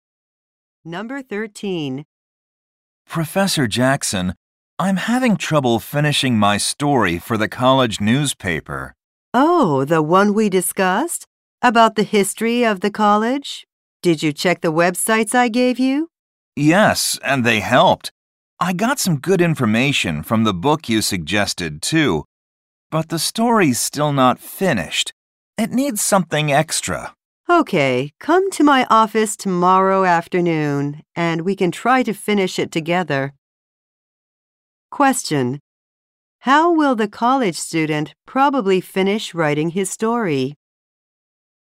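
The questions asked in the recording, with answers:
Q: How will the college student probably finish writing his story?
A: With the professor's help in his office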